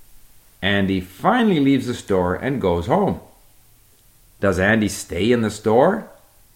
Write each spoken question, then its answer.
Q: Does Andy stay in the store?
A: No, Andy finally leaves the store and goes home.